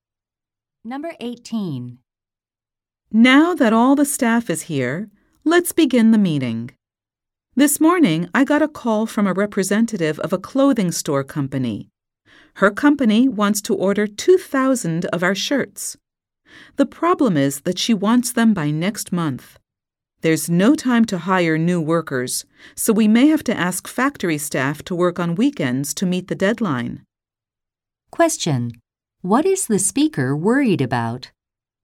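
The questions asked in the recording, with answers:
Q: What is the speaker worried about?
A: Meeting the deadline for the 2,000-shirt order by next month.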